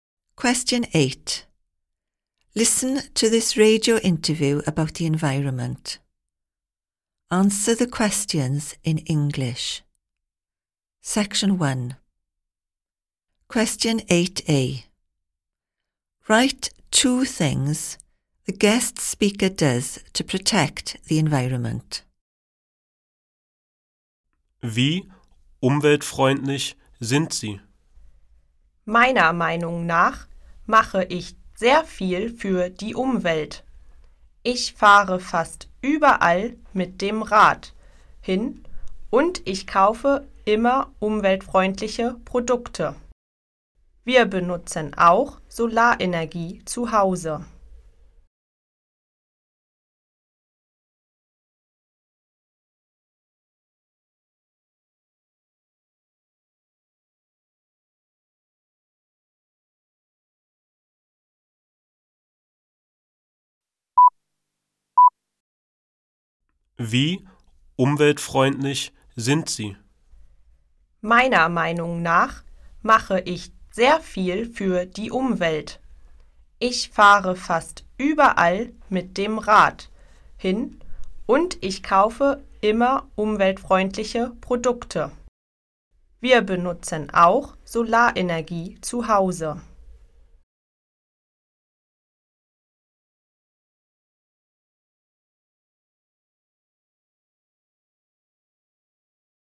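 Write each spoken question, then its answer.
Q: Write two things the guest speaker does to protect the environment.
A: Cycles almost everywhere; buys environmentally friendly products (also uses solar energy at home)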